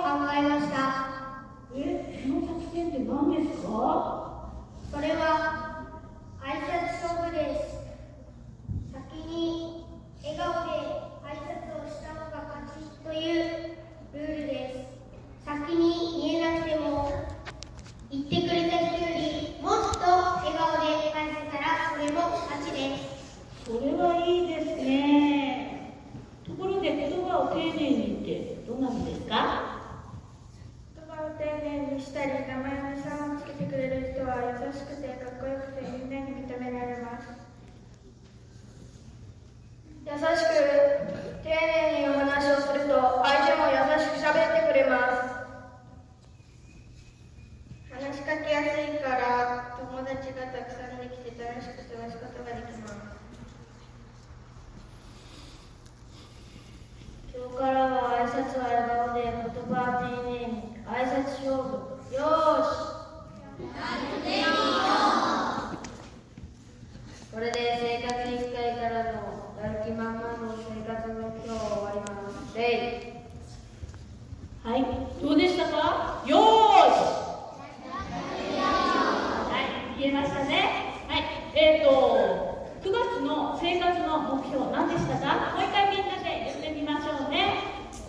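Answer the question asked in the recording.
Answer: 挨拶は笑顔で、言葉は丁寧に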